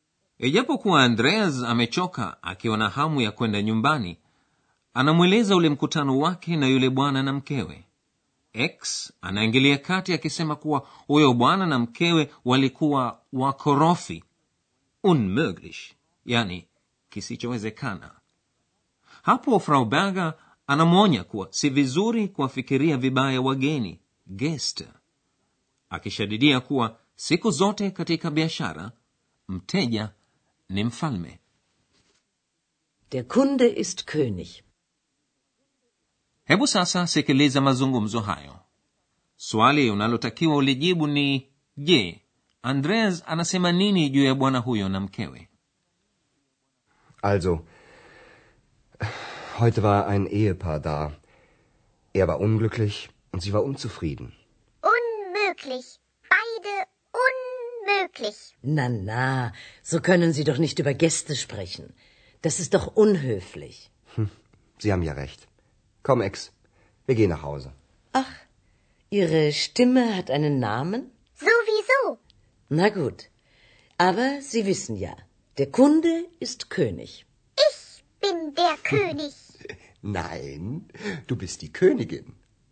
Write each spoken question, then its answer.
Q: je, Andreas anasema nini juu ya bwana huyo na mkewe?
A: andreas amesema kuwa huyo bwana alikuwa hana furaha na mkewe alikuwa hajaridhika